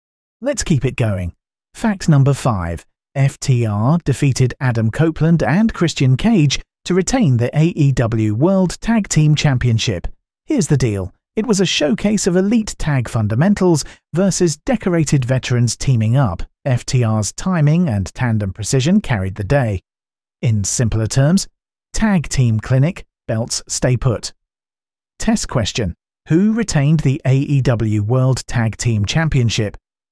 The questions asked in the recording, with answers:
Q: Who retained the AEW World Tag Team Championship?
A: FTR.